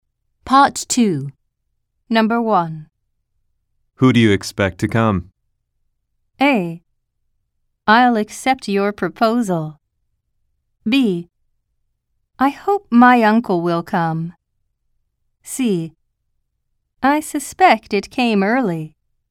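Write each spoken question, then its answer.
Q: Who do you expect to come?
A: B: I hope my uncle will come.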